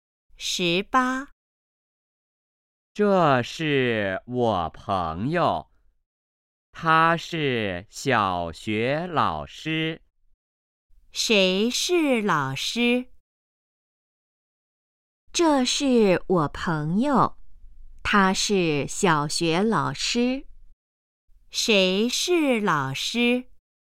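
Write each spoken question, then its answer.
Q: 谁是老师?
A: 他的朋友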